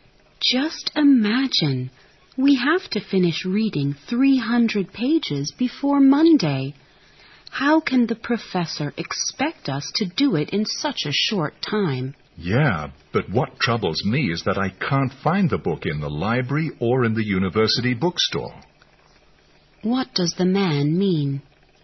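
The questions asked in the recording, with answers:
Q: What does the man mean?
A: He is more worried that he can't find the book, in the library or the bookstore, than about the amount of reading.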